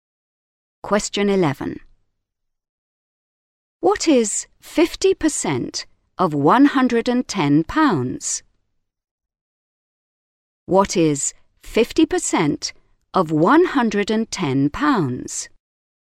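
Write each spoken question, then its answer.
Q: What is 50% of £110?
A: £55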